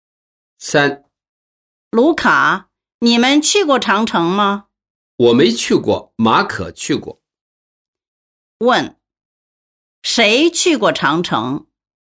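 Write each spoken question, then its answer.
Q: 谁去过长城?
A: 马可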